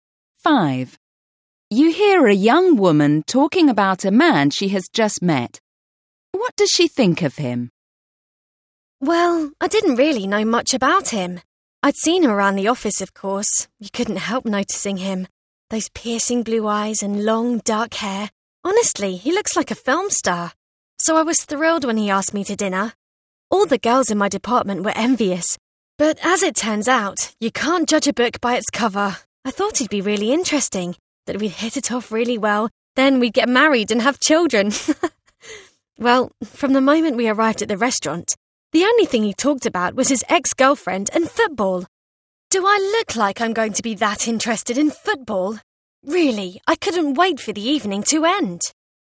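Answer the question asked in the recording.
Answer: He is boring and disappointing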